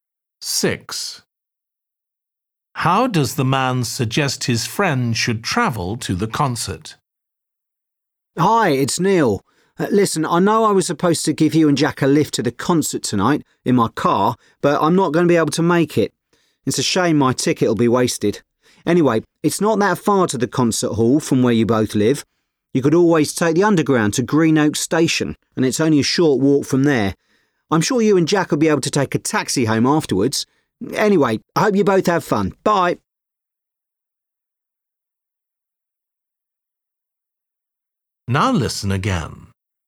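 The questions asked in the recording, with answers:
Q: How does the man suggest his friend should travel to the concert?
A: by underground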